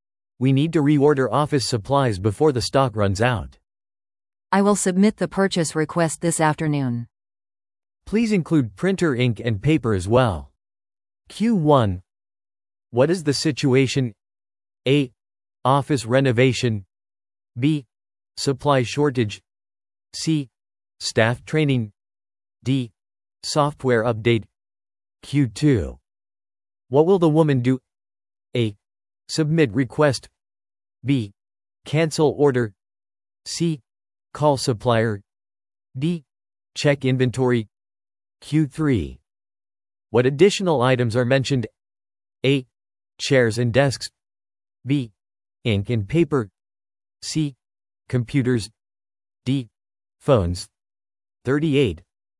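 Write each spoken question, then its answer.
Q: What is the situation?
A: B: Supply shortage.

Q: What will the woman do?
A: A: Submit request.

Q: What additional items are mentioned?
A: B: Ink and paper.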